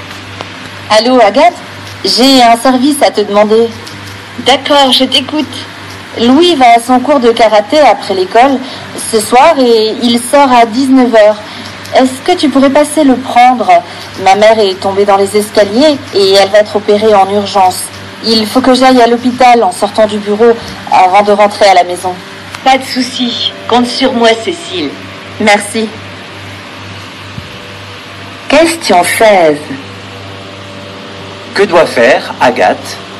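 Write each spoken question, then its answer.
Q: Que doit faire Agathe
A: Aller chercher Louis à son cours de karaté à 19h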